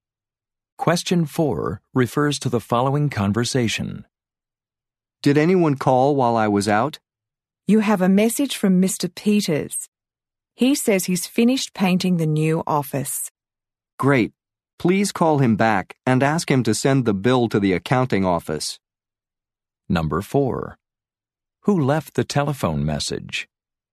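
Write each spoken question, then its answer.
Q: Who left the telephone message?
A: Mr. Peters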